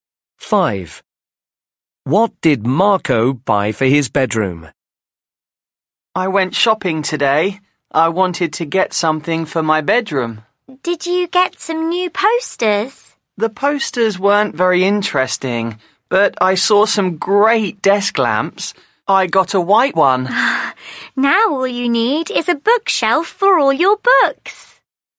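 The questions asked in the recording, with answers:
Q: What did Marco buy for his bedroom?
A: a desk lamp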